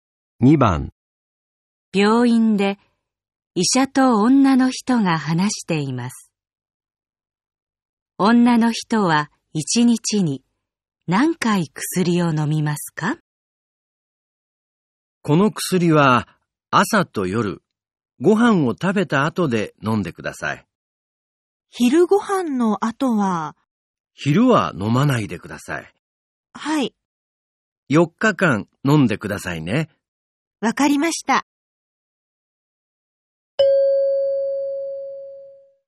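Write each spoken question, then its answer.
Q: 女の人は1日に何回薬を飲みますか?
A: 2回(朝と夜)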